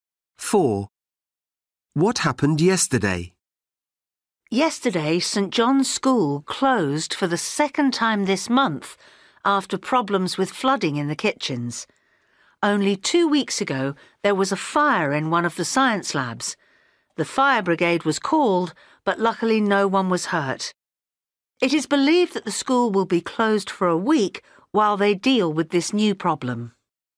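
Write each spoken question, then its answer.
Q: What happened yesterday?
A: St. John's School closed because of flooding in the kitchens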